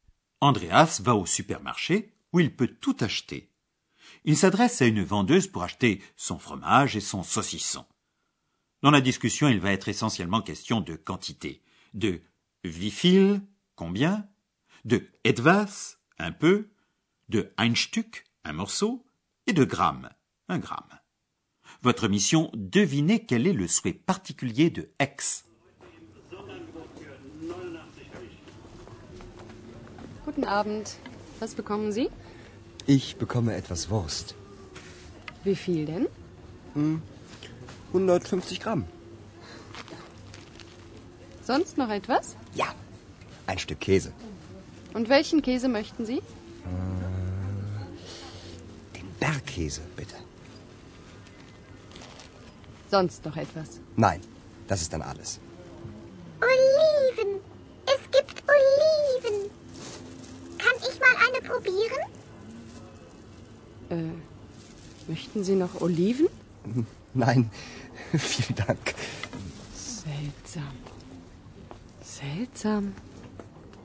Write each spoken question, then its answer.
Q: Votre mission, devinez quel est le souhait particulier de X.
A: X a découvert des olives et elle aimerait bien en goûter une.